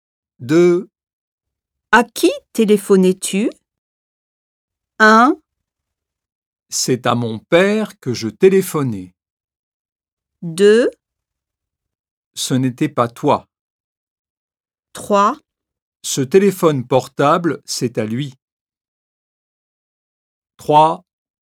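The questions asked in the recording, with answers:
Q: À qui téléphonais-tu?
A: 1: C'est à mon père que je téléphonais.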